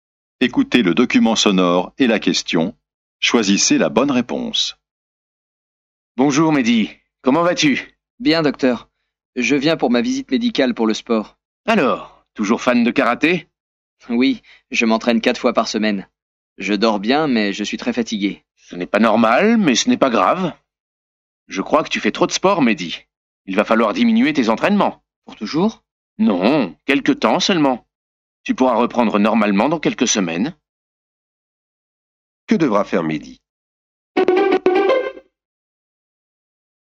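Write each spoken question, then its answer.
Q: Que devra faire Mehdi?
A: Diminuer ses entraînements de karaté pendant quelques semaines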